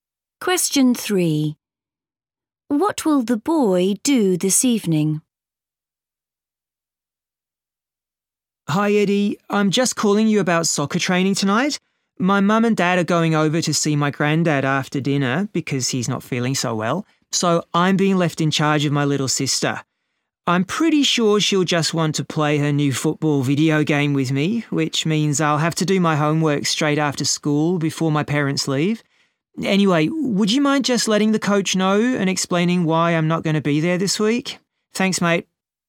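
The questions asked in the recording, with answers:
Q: What will the boy do this evening?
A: Look after his little sister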